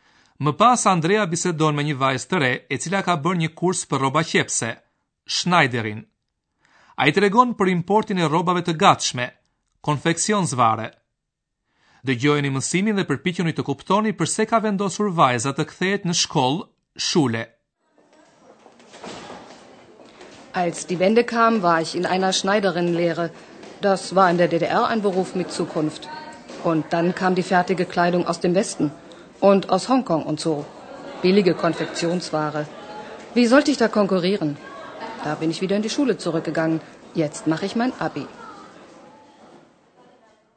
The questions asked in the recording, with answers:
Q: pse ka vendosur vajza të kthehet në shkollë, shule.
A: Ajo nuk mendoj se kishte shanse të konkuronte me këto rroba të lira të gatshme.